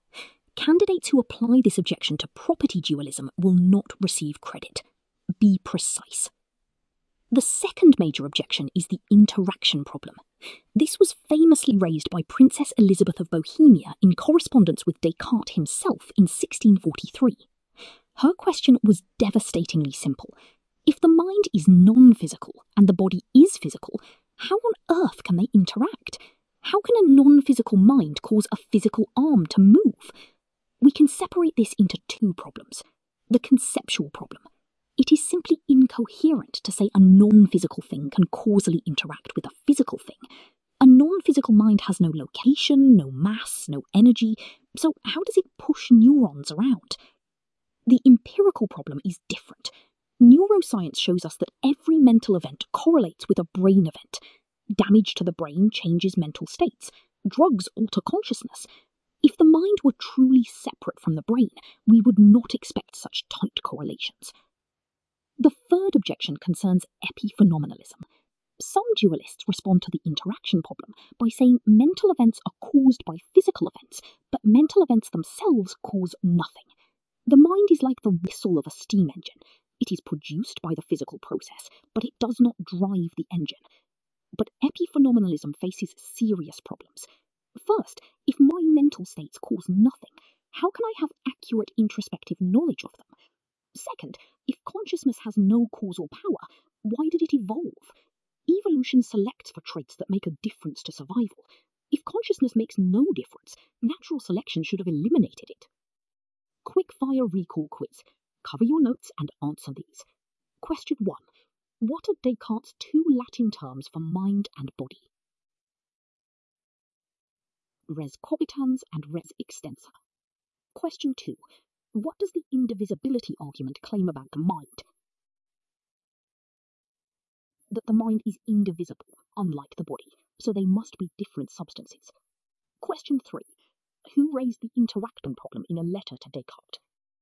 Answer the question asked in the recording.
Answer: Princess Elizabeth of Bohemia in 1643.